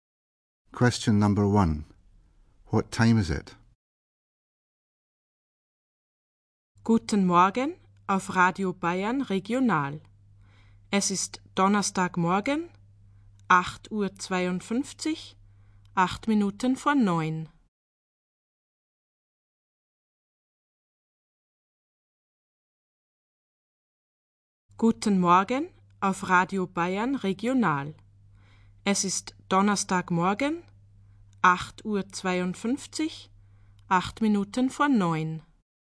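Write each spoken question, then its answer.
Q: What time is it?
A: 8:52 (8 minutes to 9) on Thursday morning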